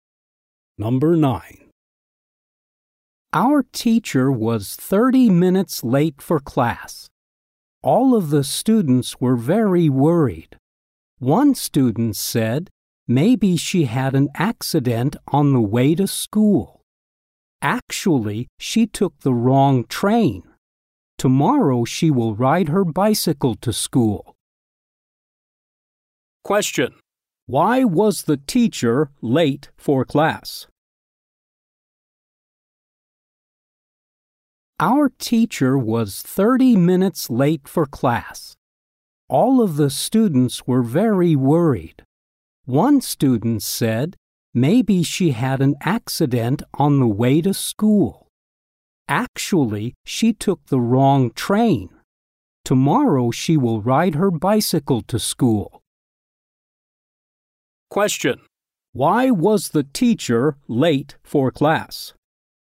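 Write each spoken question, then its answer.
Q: Why was the teacher late for class?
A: She took the wrong train.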